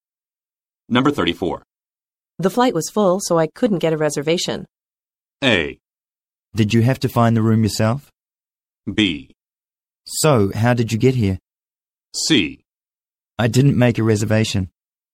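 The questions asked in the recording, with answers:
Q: The flight was full, so I couldn't get a reservation.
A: B: So, how did you get here?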